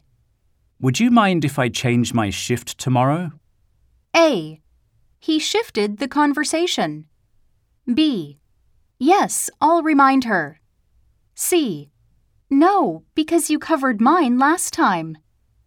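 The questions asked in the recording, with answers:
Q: Would you mind if I change my shift tomorrow?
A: C: No, because you covered mine last time.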